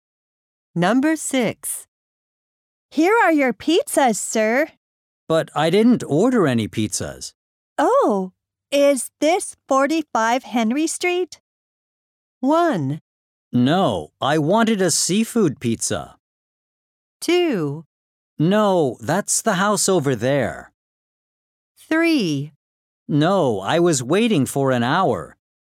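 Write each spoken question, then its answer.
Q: Oh, is this 45 Henry Street?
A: 2: No, that's the house over there.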